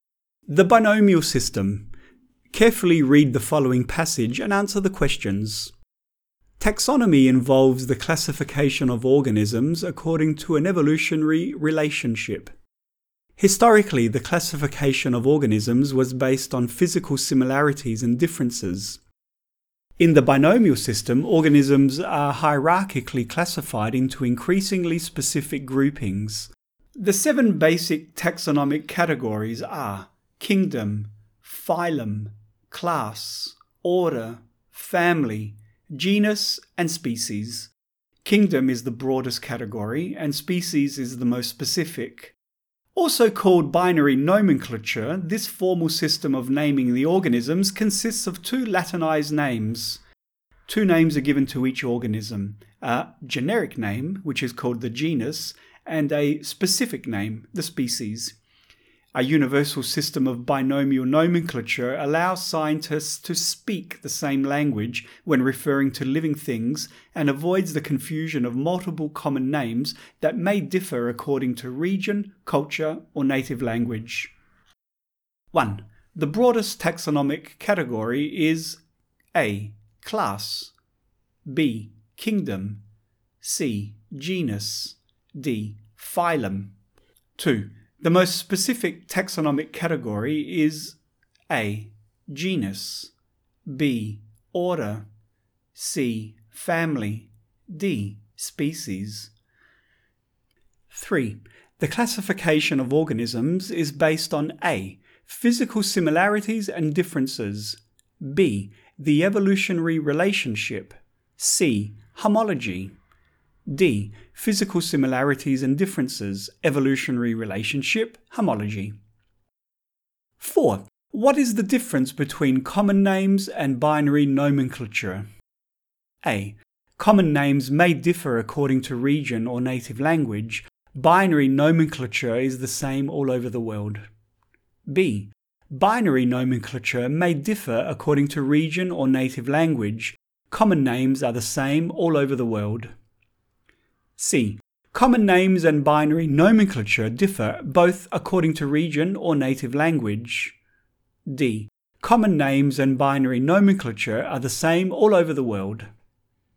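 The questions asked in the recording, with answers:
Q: The broadest taxonomic category is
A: B: Kingdom

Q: The most specific taxonomic category is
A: D: Species

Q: What is the difference between common names and binary nomenclature?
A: A: Common names may differ according to region or native language. Binary nomenclature is the same all over the world.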